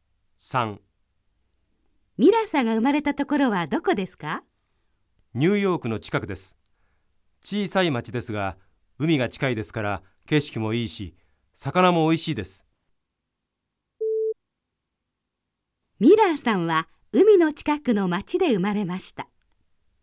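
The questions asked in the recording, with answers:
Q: ミラーさんは海の近くの町で生まれました。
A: ○(正しい)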